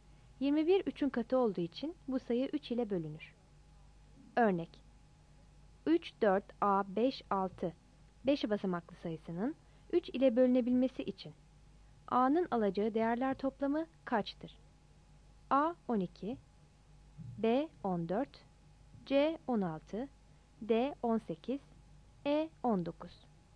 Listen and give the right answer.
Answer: Yanıt D'dir.